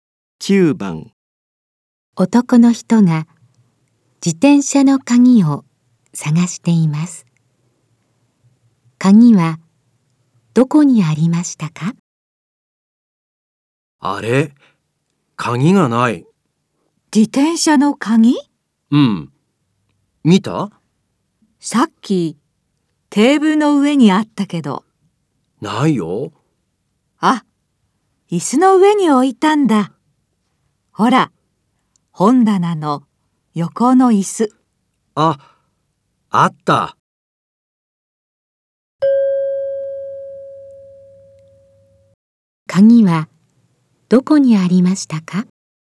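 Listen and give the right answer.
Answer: 本棚の横の椅子の上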